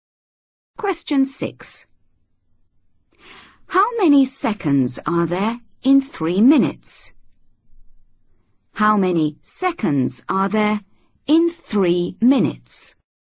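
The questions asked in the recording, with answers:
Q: How many seconds are there in 3 minutes?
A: 180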